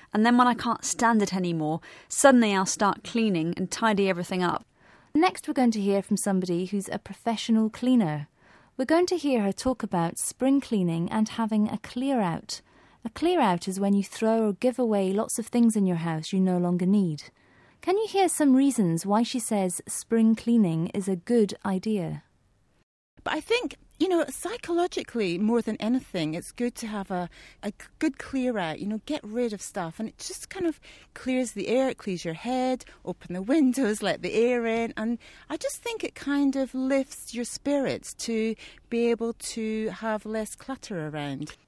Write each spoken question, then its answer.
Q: Can you hear some reasons why she says spring cleaning is a good idea?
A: She said that spring cleaning clears the air and your head.